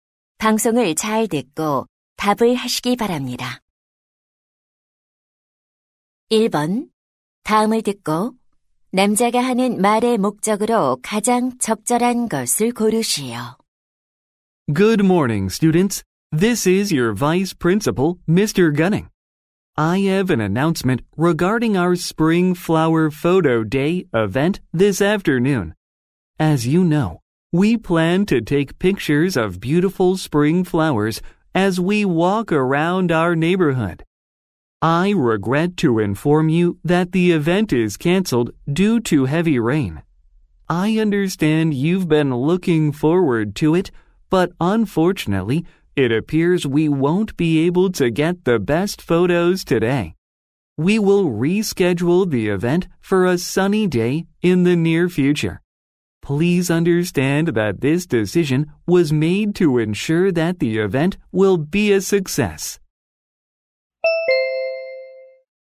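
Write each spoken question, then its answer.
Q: 다음을 듣고 남자가 하는 말의 목적으로 가장 적절한 것을 고르시오.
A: 폭우로 봄꽃 사진 촬영 행사가 취소되었음을 알리려고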